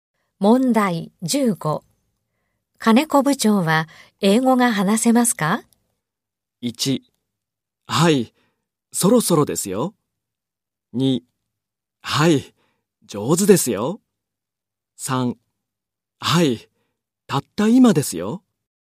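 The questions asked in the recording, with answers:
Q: 金子部長は英語が話せますか?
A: 3: はい、上手ですよ。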